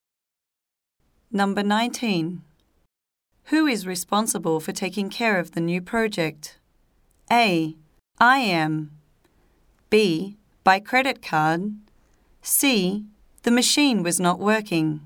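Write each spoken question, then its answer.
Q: Who is responsible for taking care of the new project?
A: A: I am.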